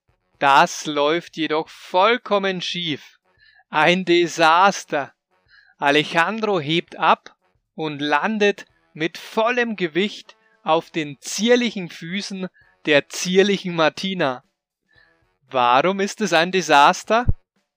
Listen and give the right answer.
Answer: Weil Alejandro abhebt und mit vollem Gewicht auf den zierlichen Füßen der zierlichen Martina landet.